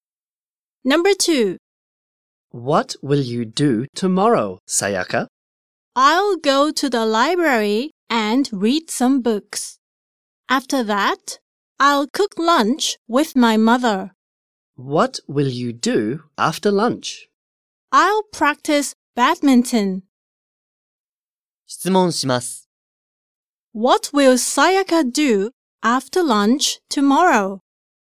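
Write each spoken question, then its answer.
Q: What will Sayaka do after lunch tomorrow?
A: She will practice badminton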